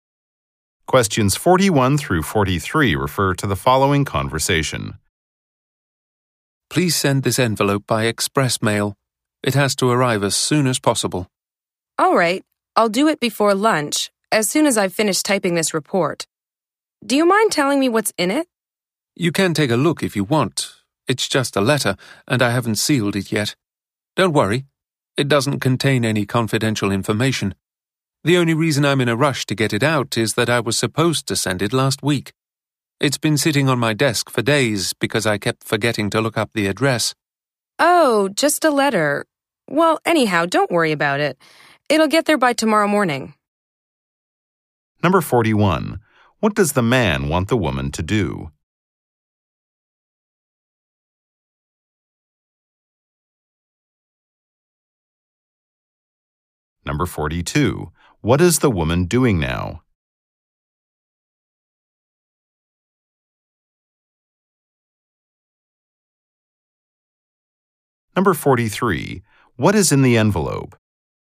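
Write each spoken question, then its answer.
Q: What does the man want the woman to do?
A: Send an envelope by express mail.

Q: What is the woman doing now?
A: Typing a report.

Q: What is in the envelope?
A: A letter.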